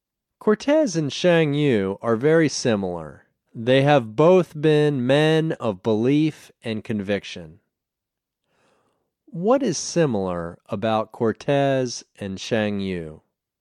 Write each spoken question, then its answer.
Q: What is similar about Cortez and Shang Yu?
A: They have both been men of belief and conviction.